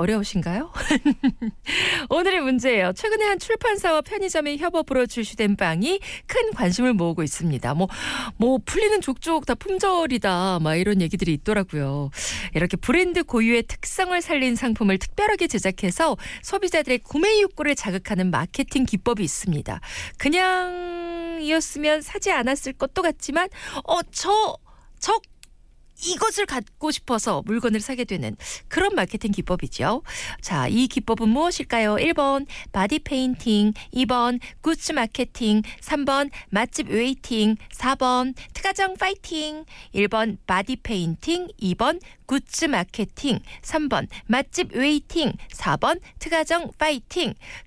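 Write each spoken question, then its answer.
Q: 자, 이 기법은 무엇일까요?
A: 2: 굿즈 마케팅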